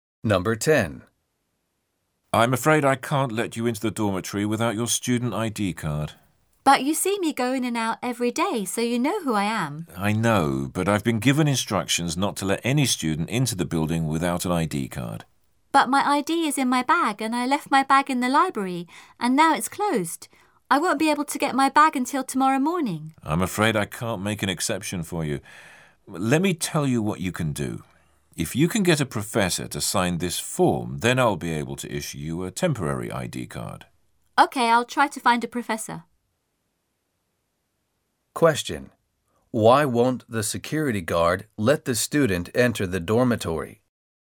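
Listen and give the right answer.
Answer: The student doesn't have his student ID card with him (it's in his bag, left in the closed library).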